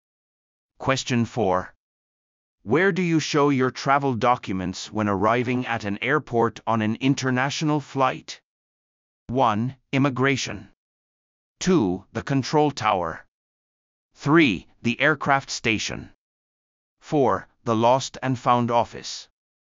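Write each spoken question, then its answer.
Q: Where do you show your travel documents when arriving at an airport on an international flight?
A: 1: Immigration.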